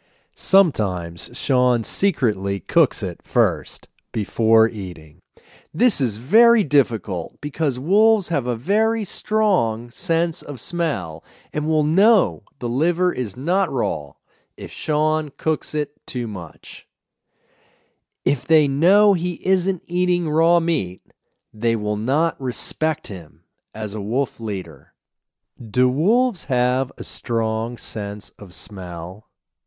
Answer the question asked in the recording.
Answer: Yes, wolves have a strong sense of smell.